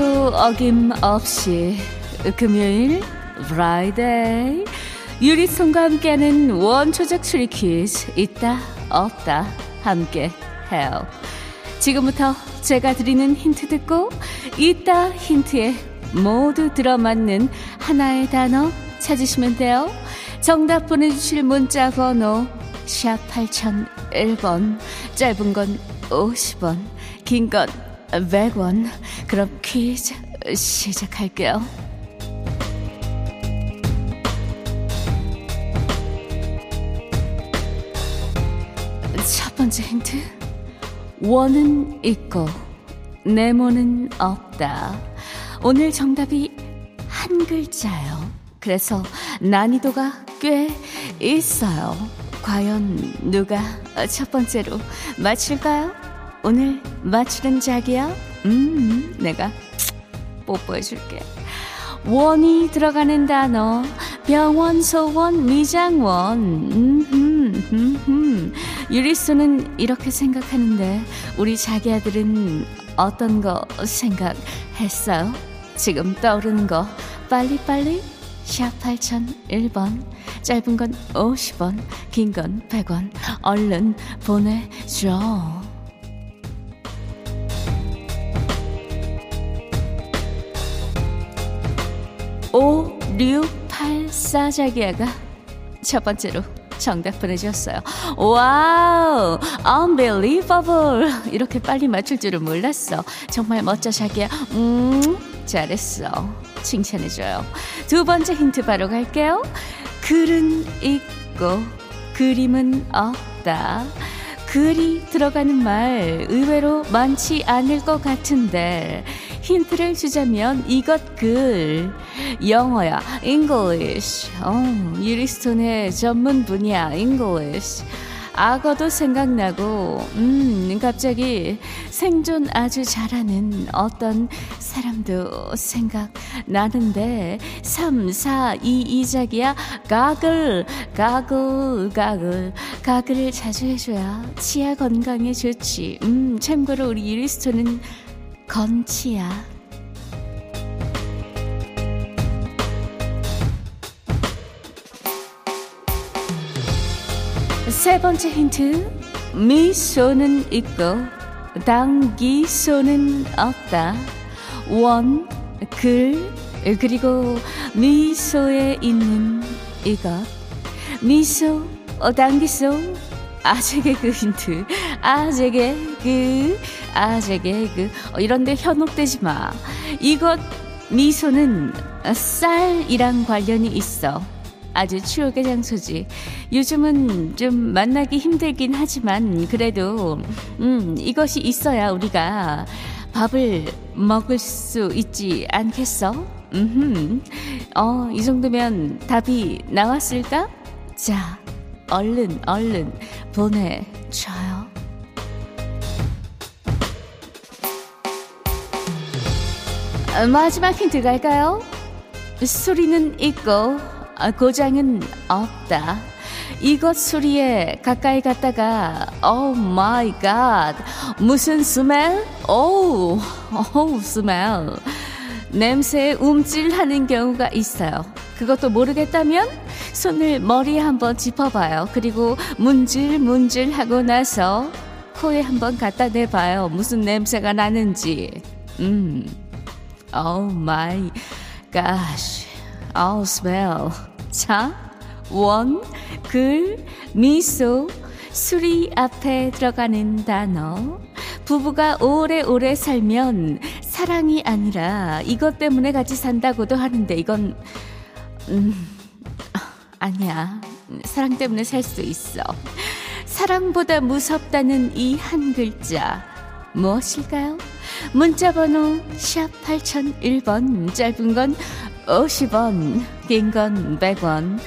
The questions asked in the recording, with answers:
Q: 자, 원, 글, 미소, 수리 앞에 들어가는 단어.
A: 자 오늘 정답은 정이었어요 정원 정글 정미소 정수리.